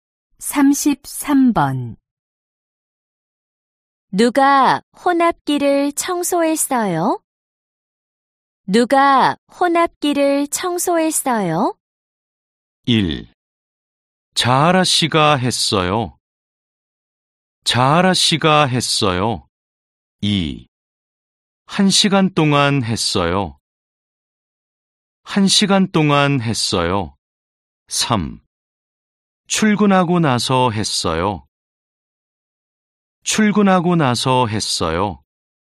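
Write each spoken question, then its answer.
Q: 누가 혼합기를 청소했어요?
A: 1: 자하라 씨가 했어요.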